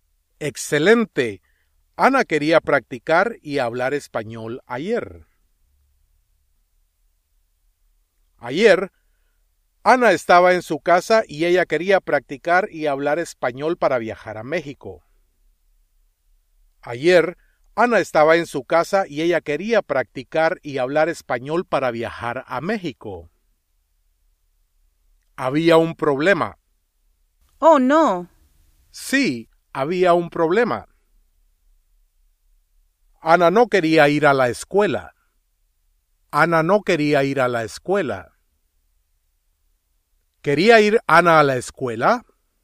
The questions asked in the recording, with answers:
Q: ¿Quería ir Ana a la escuela?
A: No.